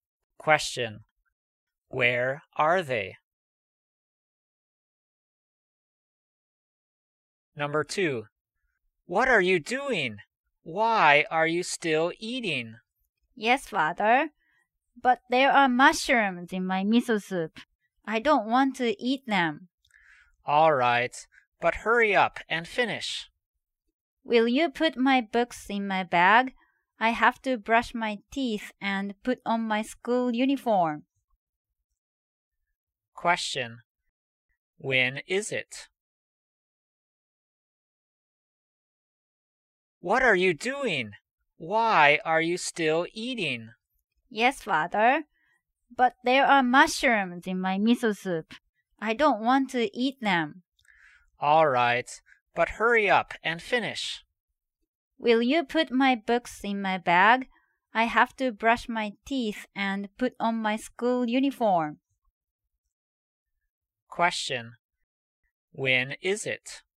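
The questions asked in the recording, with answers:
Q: When is it?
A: In the morning, before school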